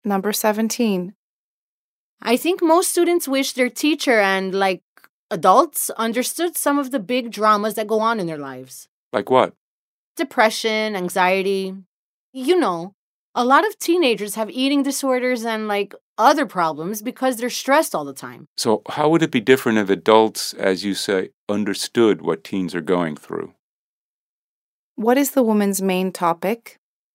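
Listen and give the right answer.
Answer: Teenagers' problems (stress, depression, anxiety) that adults don't understand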